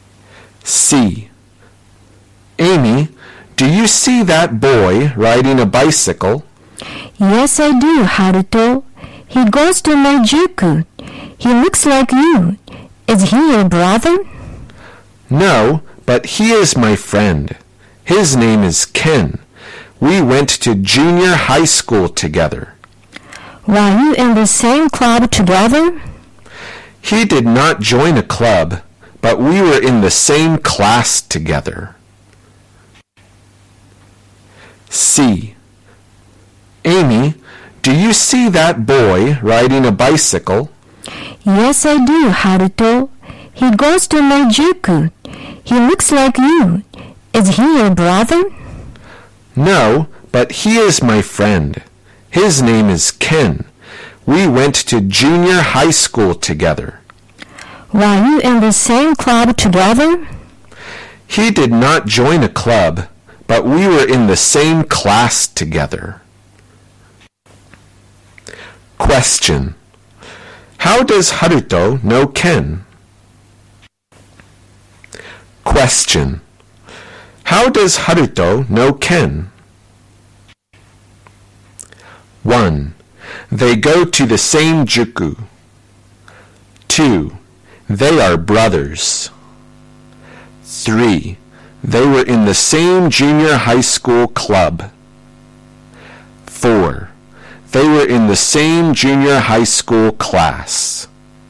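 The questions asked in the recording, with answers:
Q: How does Haruto know Ken?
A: 4: They were in the same junior high school class.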